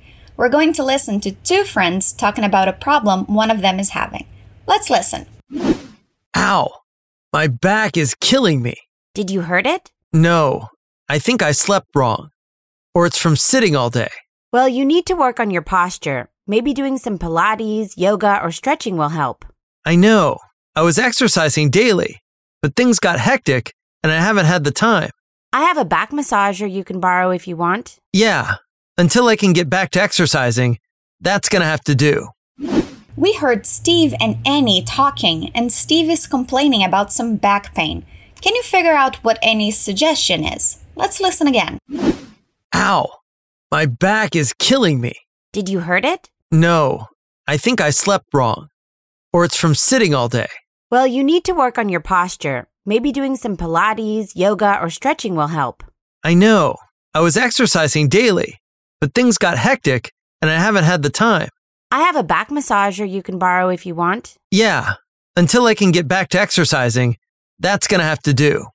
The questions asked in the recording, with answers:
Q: Can you figure out what Annie's suggestion is?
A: Annie suggests some exercises to get rid of the pain.